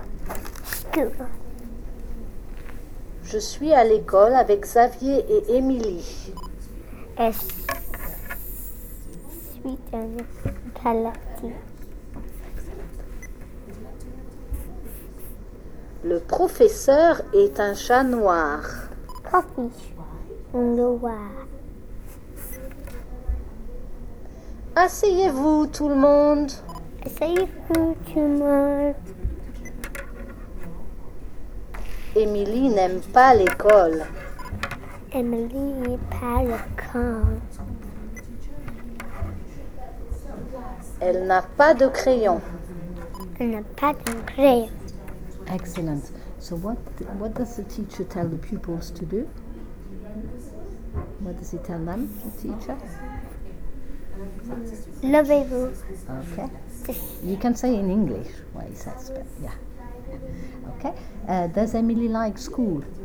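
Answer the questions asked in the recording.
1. Sit down
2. No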